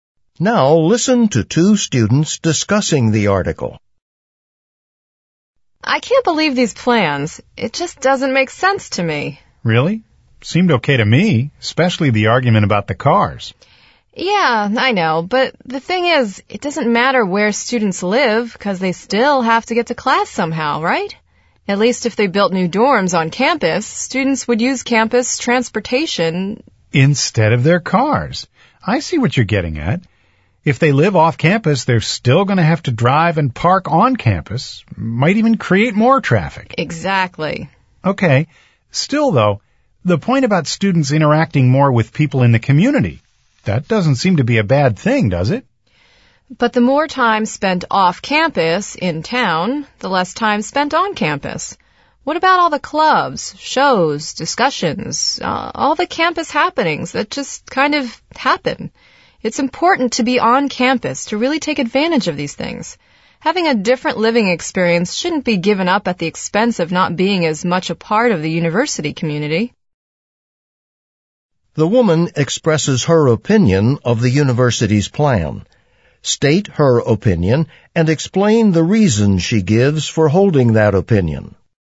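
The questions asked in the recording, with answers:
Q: The woman expresses her opinion of the university's plan. State her opinion and explain the reason she gives for holding that opinion.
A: She disagrees with the plan: students living off campus will still drive and park on campus, which may add traffic, and they will spend less time on campus and miss out on campus activities and community.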